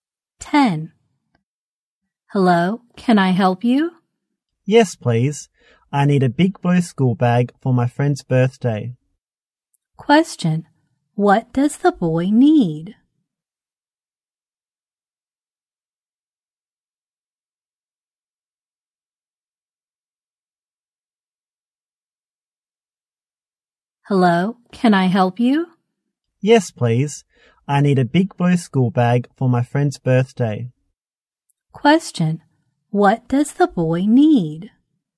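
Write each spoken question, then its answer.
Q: What does the boy need?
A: A big school bag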